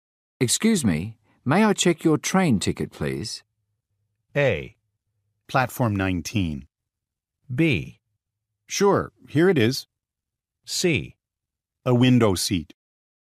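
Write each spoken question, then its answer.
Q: Excuse me, may I check your train ticket, please?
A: B: Sure, here it is.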